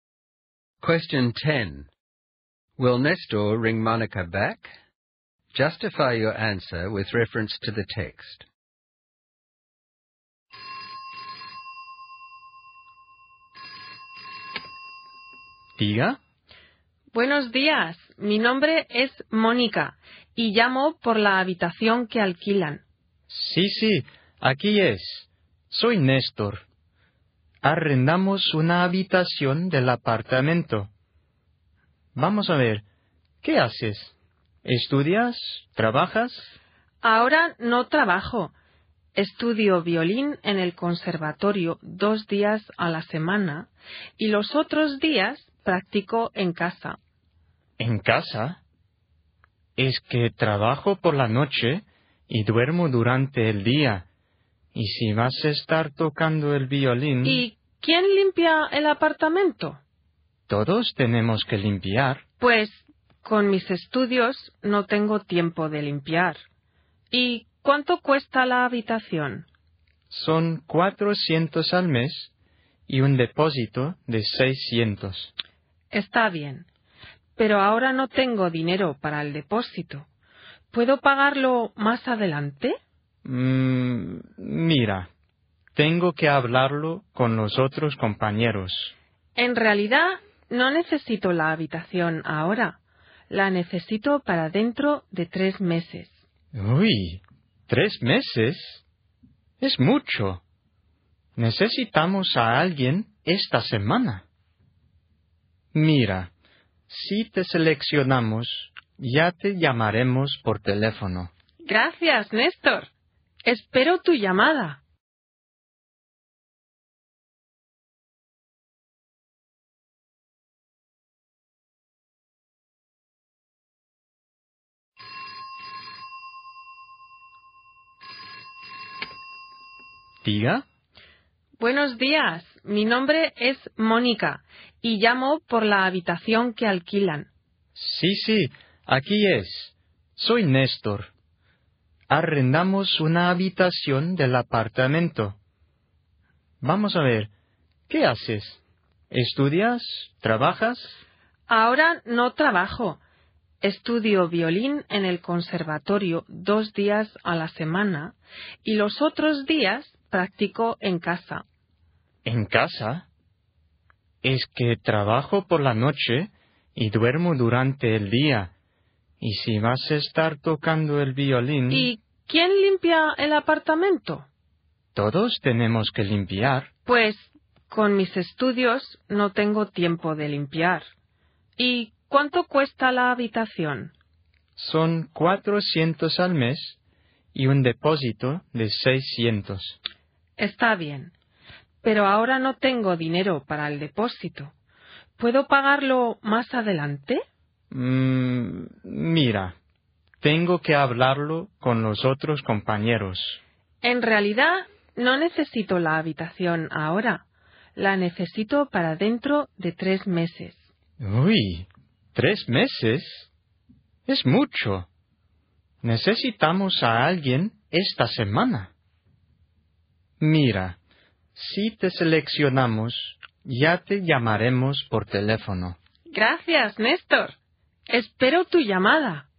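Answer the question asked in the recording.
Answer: Probably not: she would practise violin at home while he sleeps during the day, she won't clean, she can't pay the deposit now, and she needs the room in 3 months, but they need someone this week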